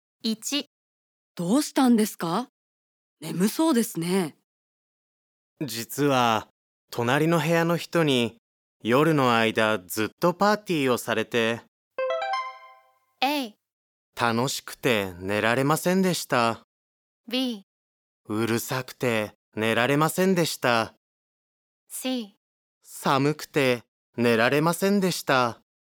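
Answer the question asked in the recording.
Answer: B: うるさくて寝られませんでした。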